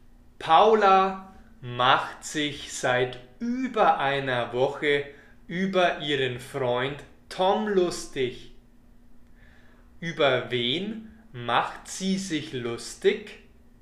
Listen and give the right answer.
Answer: über Tom. Sie macht sich über Tom lustig.